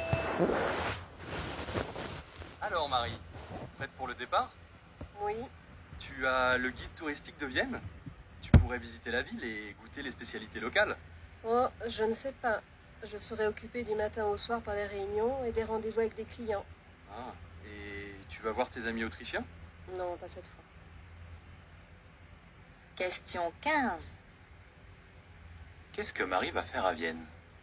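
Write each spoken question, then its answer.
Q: Qu'est-ce que Marie va faire à Vienne ?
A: Elle va travailler (réunions et rendez-vous avec des clients).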